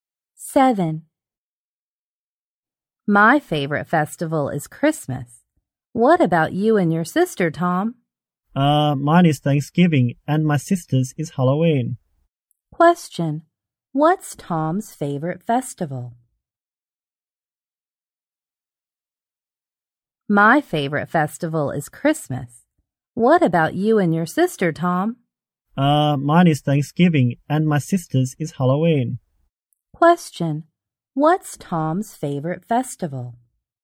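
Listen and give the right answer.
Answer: Thanksgiving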